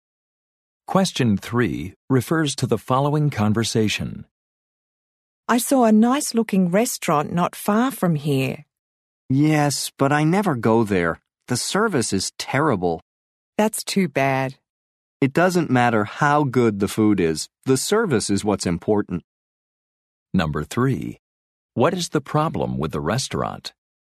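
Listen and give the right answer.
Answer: The service is terrible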